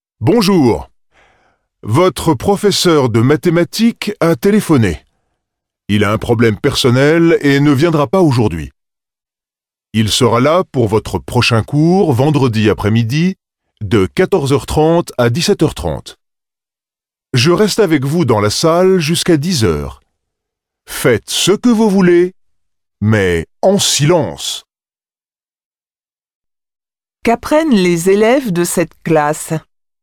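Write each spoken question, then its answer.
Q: Qu'apprennent les élèves de cette classe ?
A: Leur professeur de mathématiques ne viendra pas aujourd'hui.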